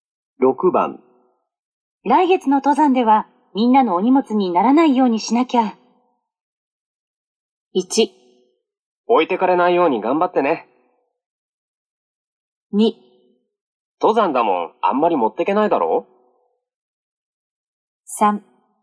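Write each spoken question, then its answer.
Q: 来月の登山ではみんなのお荷物にならないようにしなきゃ。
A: 1: 置いてかれないように頑張ってね。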